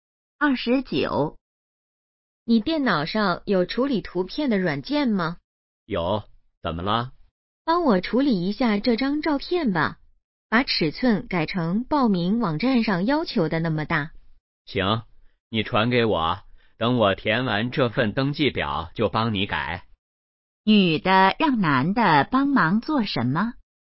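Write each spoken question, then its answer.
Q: 女的让男的帮忙做什么?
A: 处理照片,改尺寸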